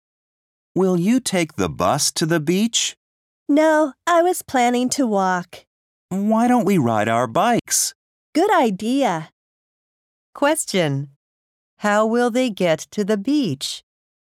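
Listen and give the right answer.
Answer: By bike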